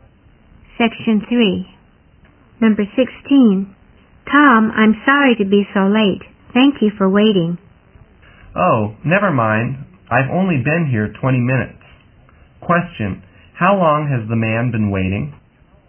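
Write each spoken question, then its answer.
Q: Question, how long has the man been waiting?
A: 20 minutes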